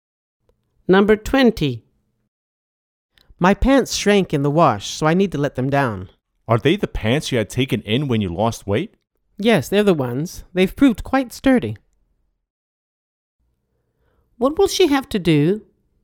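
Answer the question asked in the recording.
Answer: let her pants down (lengthen them)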